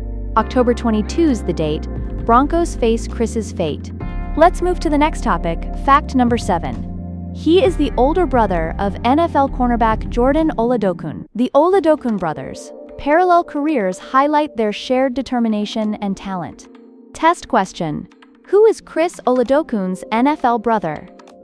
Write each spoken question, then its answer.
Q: Who is Chris Oladokun's NFL brother?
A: Jordan Oladokun.